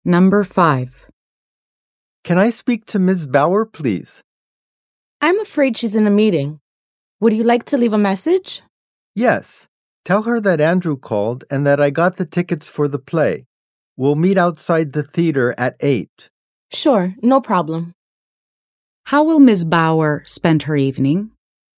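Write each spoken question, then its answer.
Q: How will Ms. Bauer spend her evening?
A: Watching a play at the theater with Andrew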